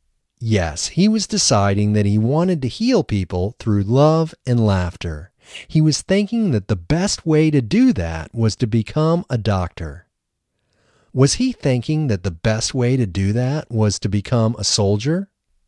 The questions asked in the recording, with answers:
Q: Was he thinking that the best way to do that was to become a soldier?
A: No, he was not thinking that the best way to do that was to become a soldier.